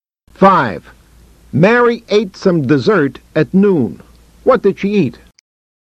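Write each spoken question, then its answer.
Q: What did she eat?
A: Some dessert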